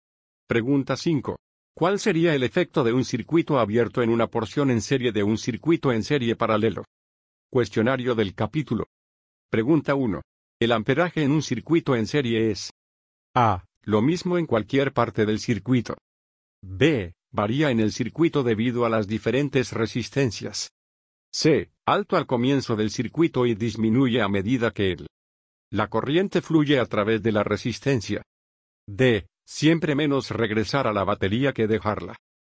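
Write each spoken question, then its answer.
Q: El amperaje en un circuito en serie es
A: A: Lo mismo en cualquier parte del circuito.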